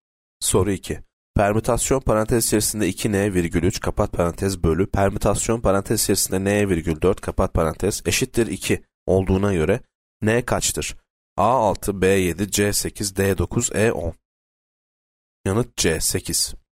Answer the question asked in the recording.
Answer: Yanıt C 8.